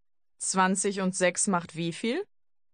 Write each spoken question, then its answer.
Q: 20 und 6 macht wie viel?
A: 26.